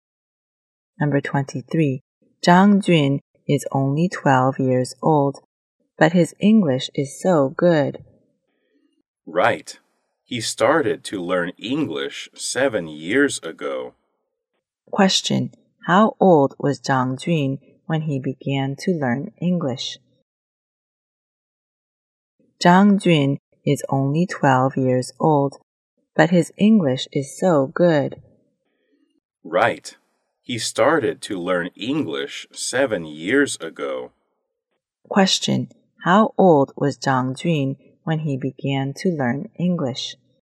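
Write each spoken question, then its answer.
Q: How old was Zhang Jun when he began to learn English?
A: 5 years old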